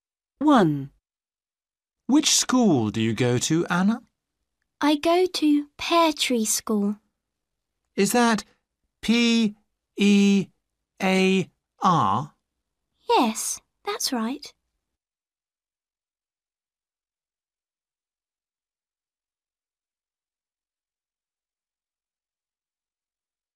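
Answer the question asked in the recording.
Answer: Pear Tree School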